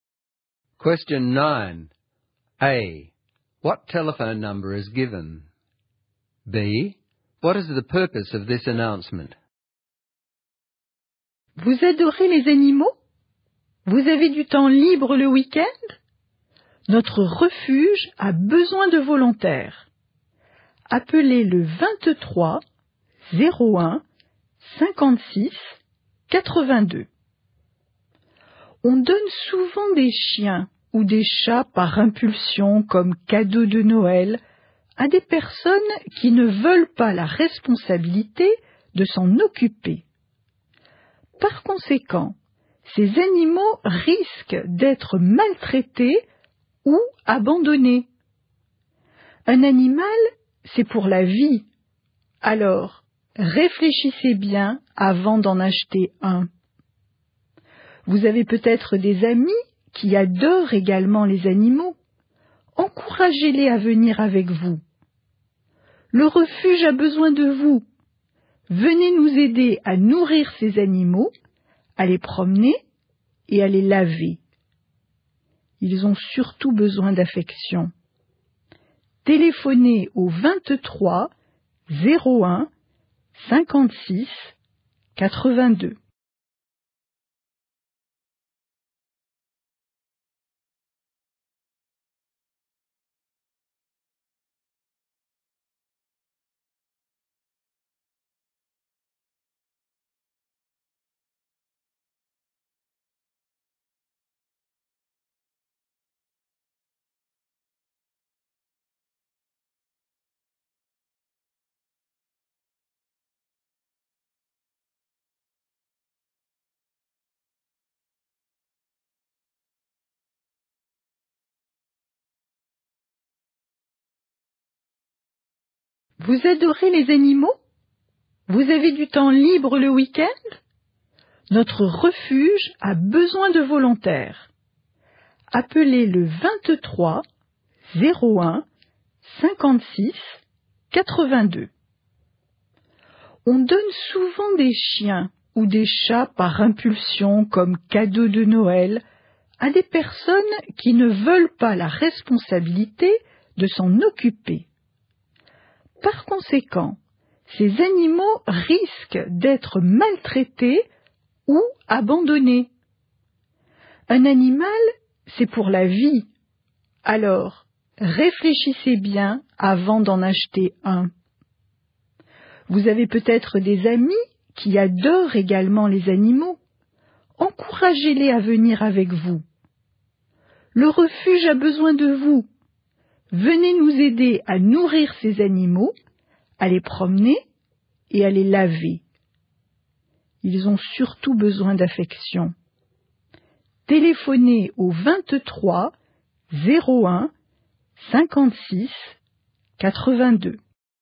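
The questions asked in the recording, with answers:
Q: What telephone number is given?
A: 23 01 56 82

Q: What is the purpose of this announcement?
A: To recruit volunteers for an animal shelter (feed, walk, wash the animals and give them affection)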